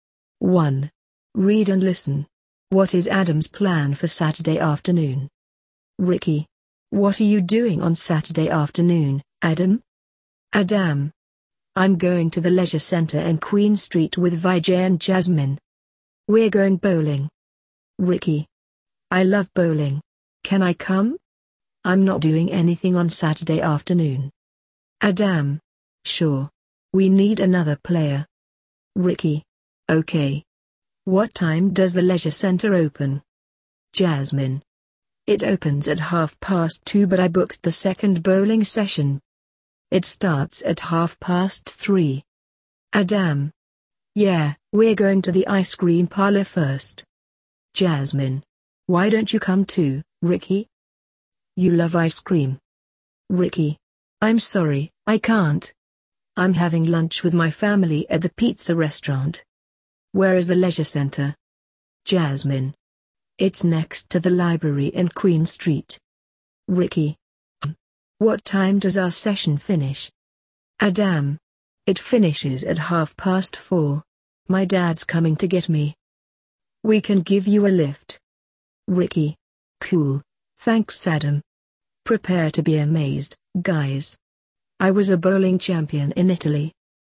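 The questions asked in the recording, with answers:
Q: What is Adam's plan for Saturday afternoon?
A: Going bowling at the leisure center in Queen Street with Vijay and Jasmine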